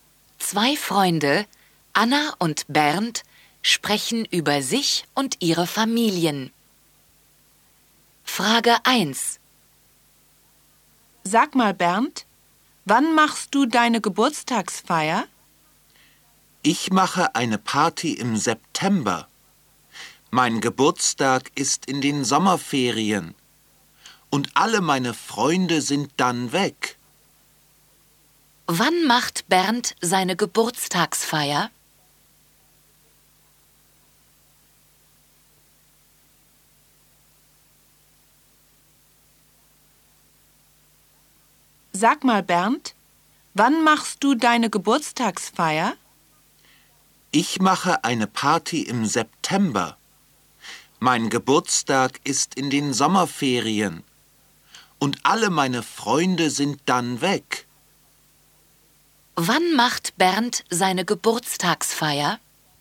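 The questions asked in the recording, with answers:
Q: Wann macht Bernd seine Geburtstagsfeier?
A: Im September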